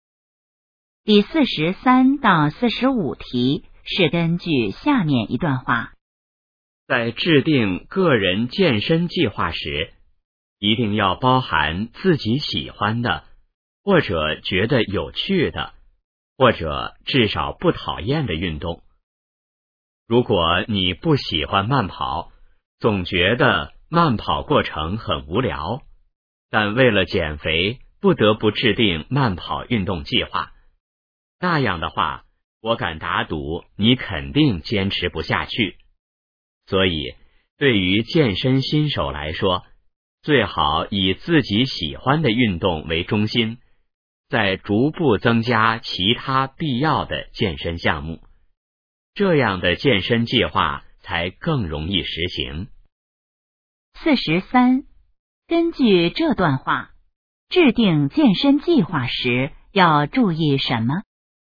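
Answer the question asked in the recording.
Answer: 要包含自己喜欢的或觉得有趣的运动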